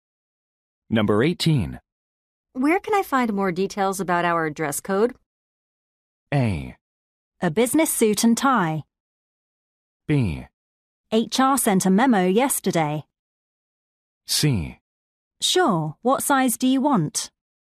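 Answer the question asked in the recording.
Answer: B: HR sent a memo yesterday.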